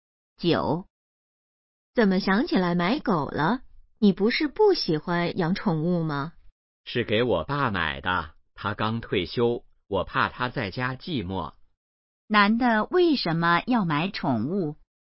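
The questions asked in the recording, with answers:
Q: 男的为什么要买宠物?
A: 怕刚退休的爸爸在家寂寞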